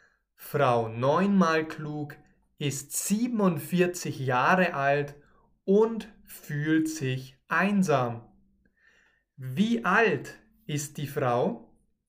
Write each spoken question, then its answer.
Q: Wie alt ist die Frau?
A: 47. Die Frau ist 47 Jahre alt.